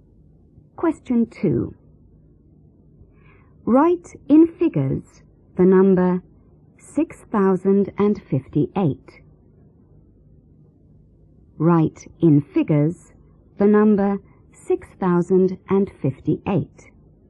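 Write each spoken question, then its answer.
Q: Write in figures the number 6058.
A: 6058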